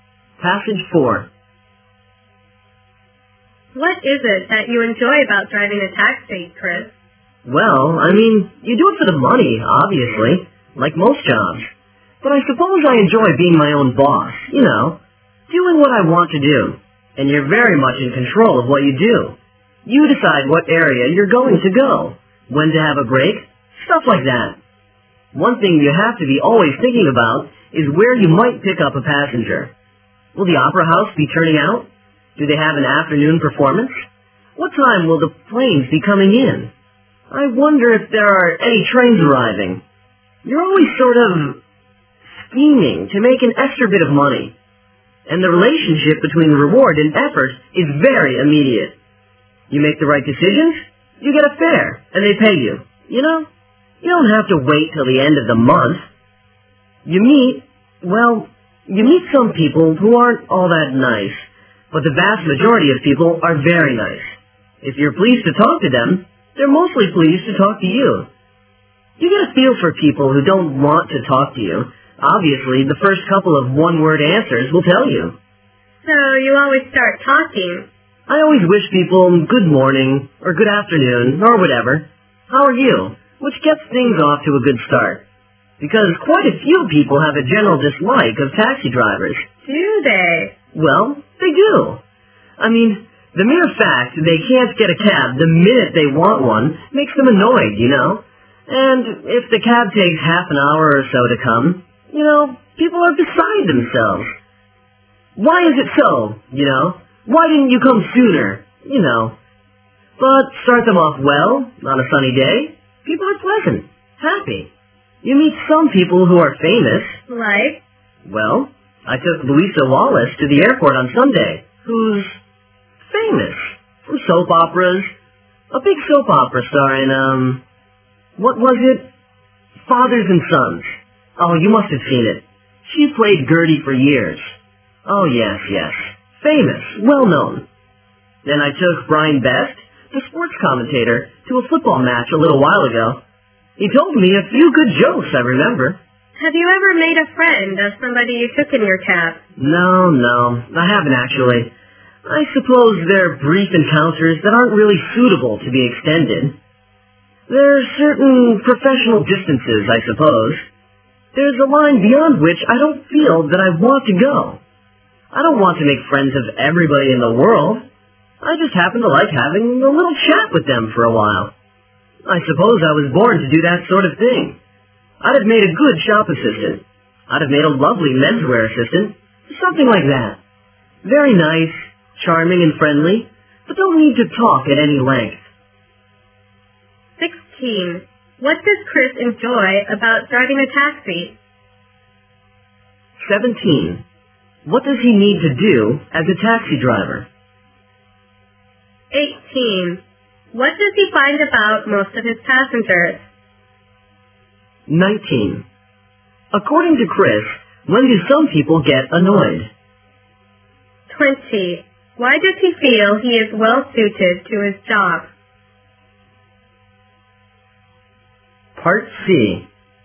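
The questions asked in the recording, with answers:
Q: What does Chris enjoy about driving a taxi?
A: Being his own boss and in control of what he does

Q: What does he need to do as a taxi driver?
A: Always think about where he might pick up passengers

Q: What does he find about most of his passengers?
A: The vast majority are very nice

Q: According to Chris, when do some people get annoyed?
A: When they can't get a cab the minute they want one

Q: Why does he feel he is well suited to his job?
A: He likes having a brief chat with people without talking at length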